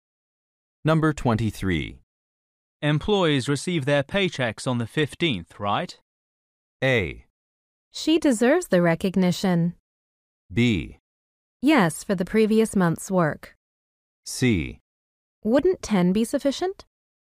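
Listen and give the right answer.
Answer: B: Yes, for the previous month's work.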